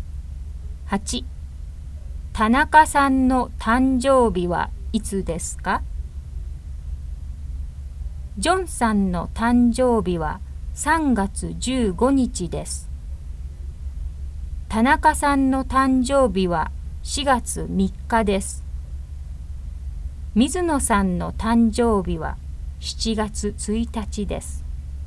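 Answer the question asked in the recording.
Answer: 4月3日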